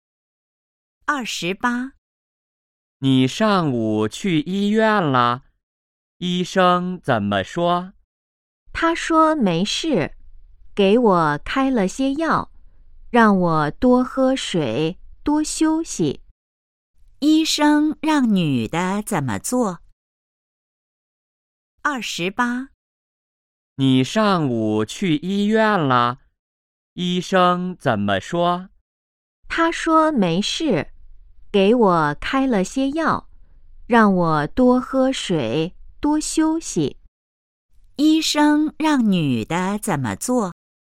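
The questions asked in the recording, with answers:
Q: 医生让女的怎么做?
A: 多喝水,多休息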